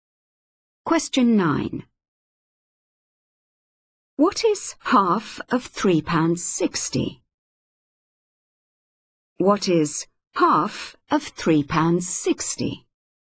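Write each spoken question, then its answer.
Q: What is half of £3.60?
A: £1.80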